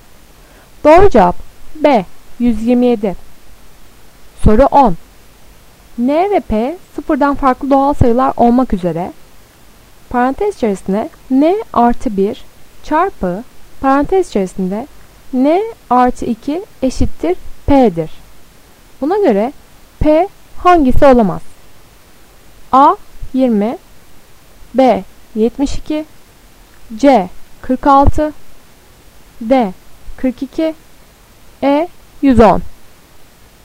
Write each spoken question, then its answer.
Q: Buna göre P hangisi olamaz?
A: Doğru cevap C 46.